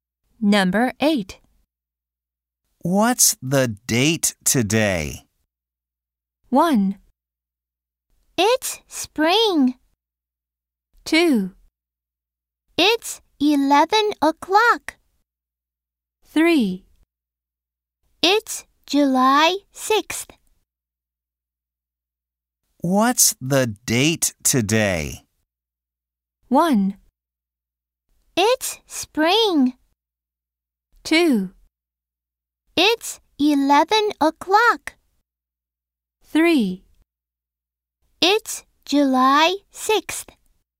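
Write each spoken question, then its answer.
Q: What's the date today?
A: 3: It's July 6th.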